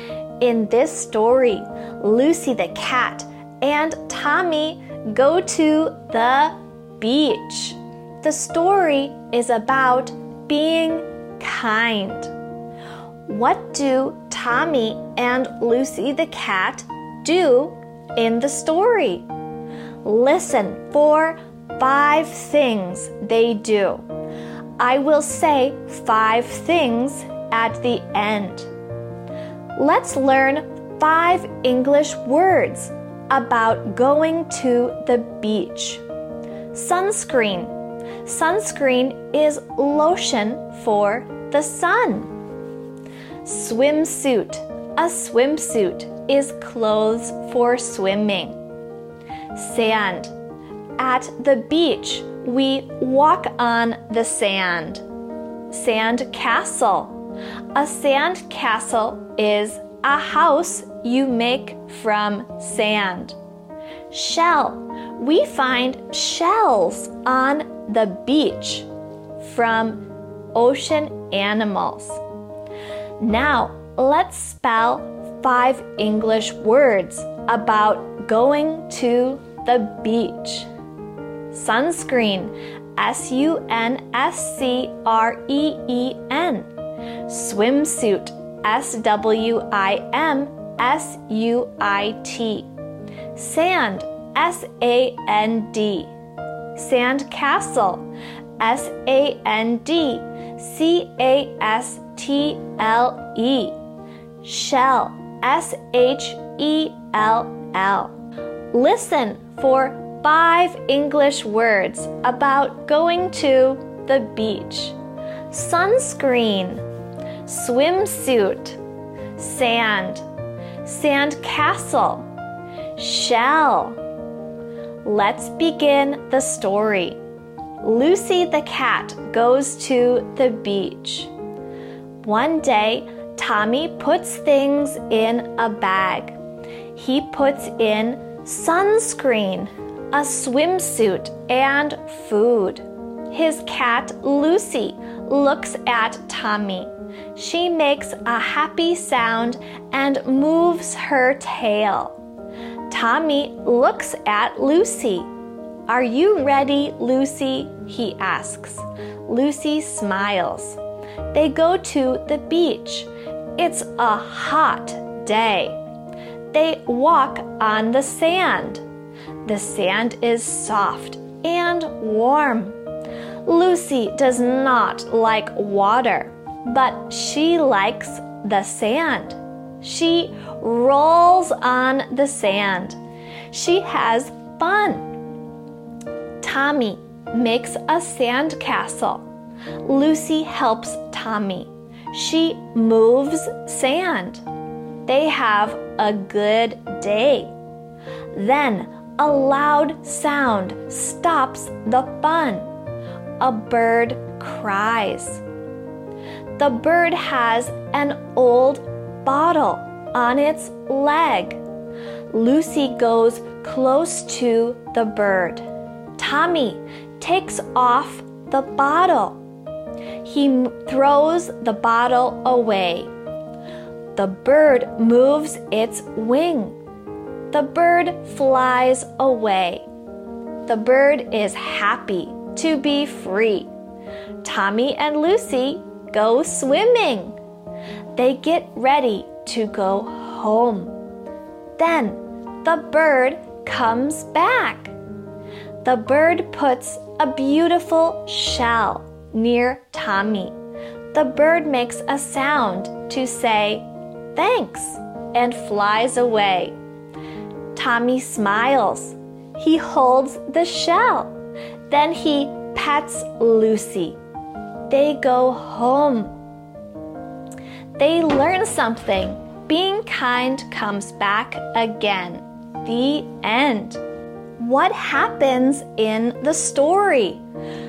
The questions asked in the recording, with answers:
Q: What do Tommy and Lucy the cat do in the story?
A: One, Tommy and Lucy the cat go to the beach. Two, they walk on the sand. Three, they make a sand castle. Four, they help a bird. Five, the bird gives them a shell.